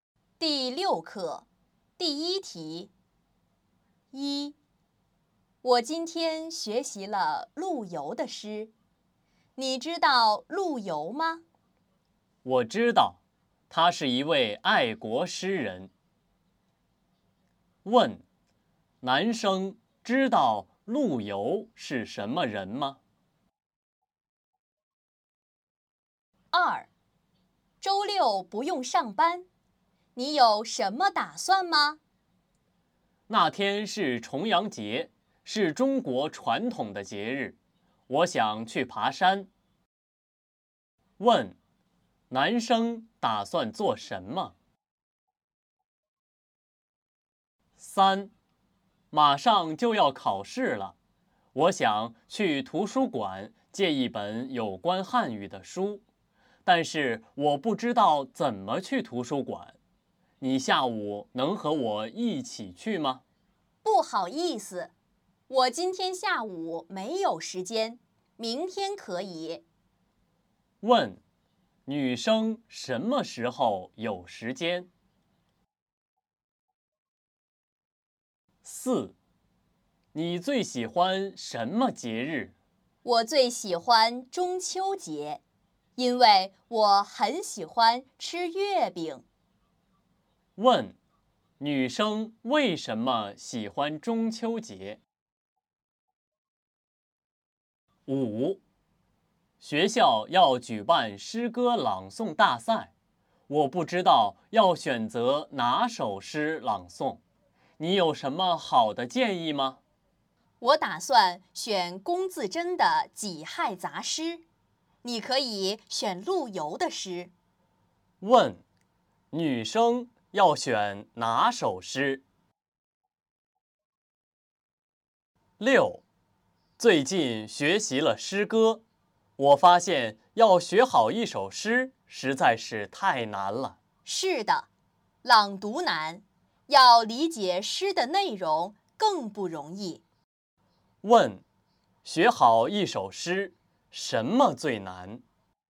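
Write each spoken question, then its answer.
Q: 男生知道陆游是什么人吗?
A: 知道,他是一位爱国诗人

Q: 男生打算做什么?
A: 去爬山

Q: 女生什么时候有时间?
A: 明天

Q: 女生为什么喜欢中秋节?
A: 因为很喜欢吃月饼

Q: 学好一首诗,什么最难?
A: 理解诗的内容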